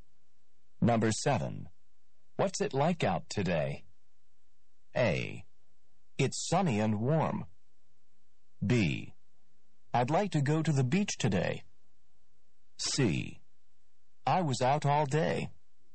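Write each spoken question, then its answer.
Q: What's it like out today?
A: A: It's sunny and warm.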